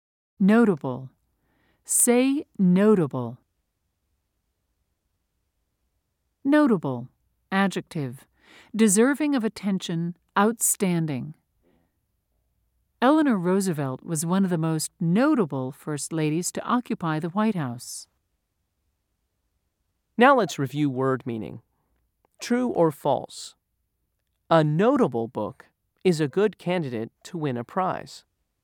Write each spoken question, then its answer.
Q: True or false? A notable book is a good candidate to win a prize.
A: If you said true, you are correct.